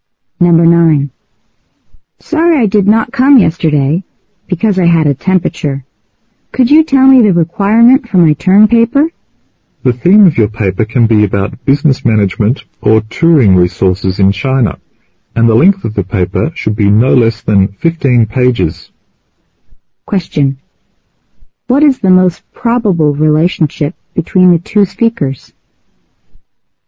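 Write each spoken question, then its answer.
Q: What is the most probable relationship between the two speakers?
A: Student and teacher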